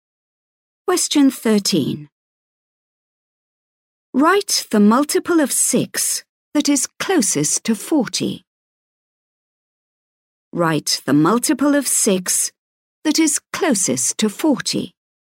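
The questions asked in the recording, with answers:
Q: Write the multiple of 6 that is closest to 40.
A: 42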